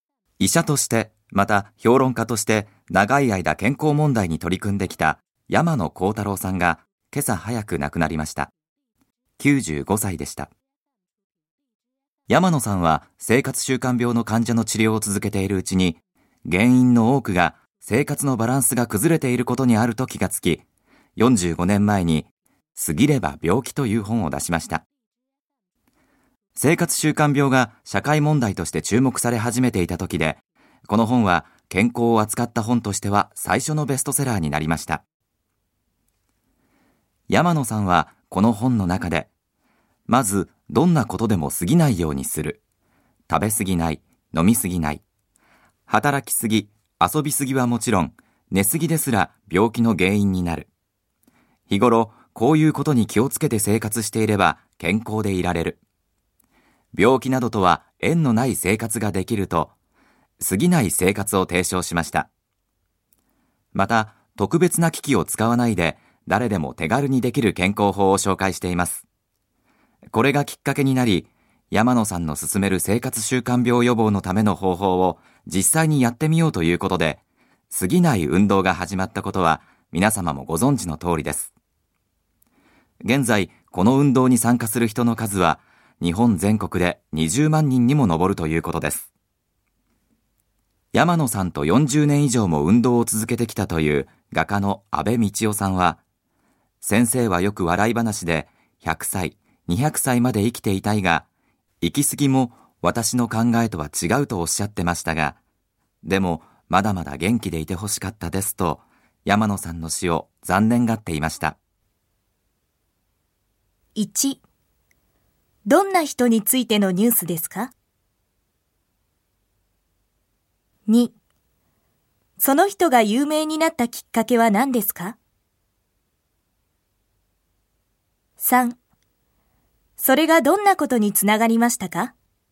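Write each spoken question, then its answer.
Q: どんな人についてのニュースですか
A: 長い間健康問題に取り組んできた医者・評論家の山野幸太郎さん(95歳で亡くなった)

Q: その人が有名になったきっかけは何ですか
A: 45年前に『過ぎれば病気』という本を出し、健康を扱った本として最初のベストセラーになったこと

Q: それがどんなことにつながりましたか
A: 過ぎない運動が始まり、今では全国で20万人が参加している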